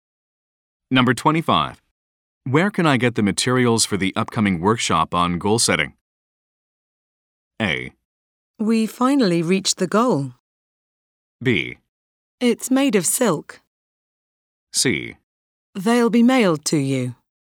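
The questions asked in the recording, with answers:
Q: Where can I get the materials for the upcoming workshop on goal setting?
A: C: They'll be mailed to you.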